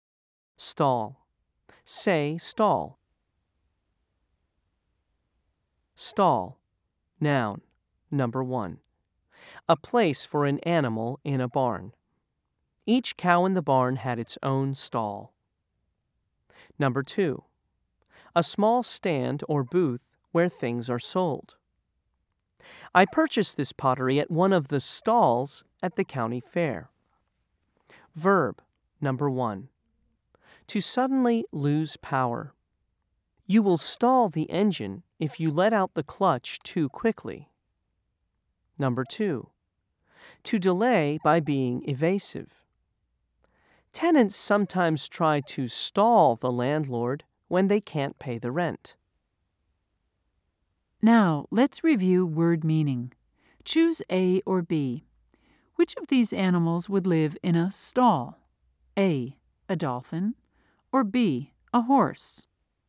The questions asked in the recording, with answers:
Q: Choose A or B. Which of these animals would live in a stall?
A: If you said B, you're correct.